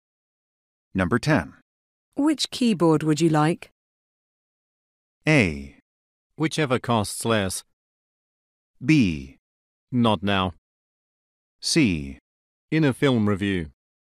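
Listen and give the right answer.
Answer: A: Whichever costs less.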